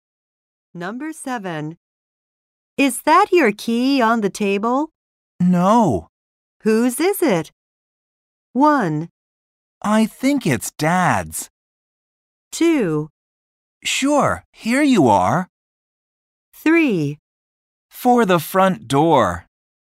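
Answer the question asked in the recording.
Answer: 1: I think it's Dad's.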